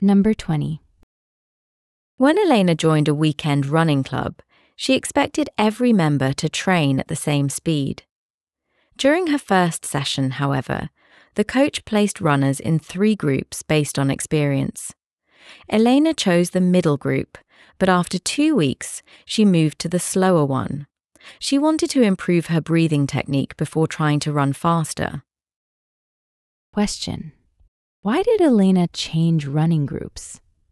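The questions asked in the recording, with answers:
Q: Question: why did Elena change running groups?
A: She wanted to improve her breathing technique before trying to run faster.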